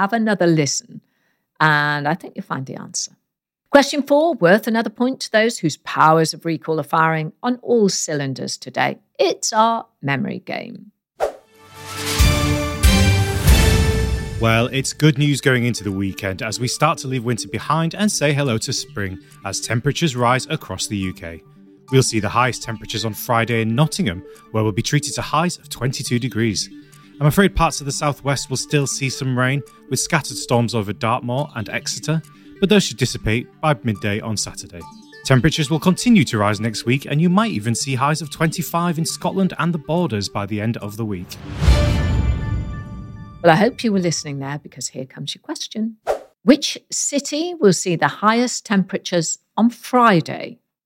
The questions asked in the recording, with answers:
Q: Which city will see the highest temperatures on Friday?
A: and the answer is Nottingham.